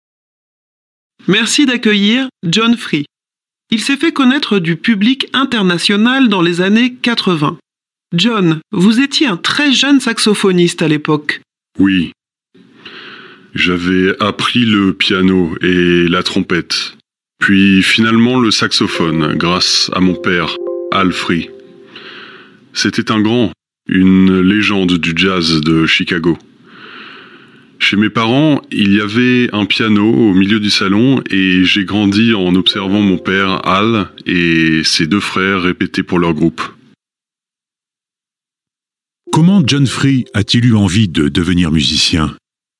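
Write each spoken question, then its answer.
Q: Comment John Free a-t-il eu envie de devenir musicien ?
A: En regardant son père, Al Free, et ses deux oncles répéter à la maison pour leur groupe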